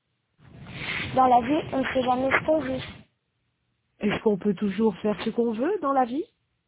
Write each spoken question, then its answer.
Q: Est-ce qu'on peut toujours faire ce qu'on veut dans la vie?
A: Non. Dans la vie, on ne fait pas ce qu'on veut.